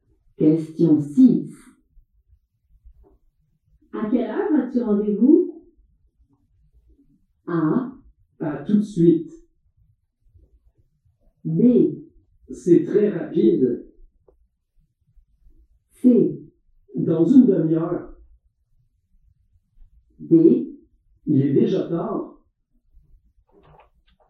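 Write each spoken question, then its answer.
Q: À quelle heure as-tu rendez-vous?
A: C: Dans une demi-heure.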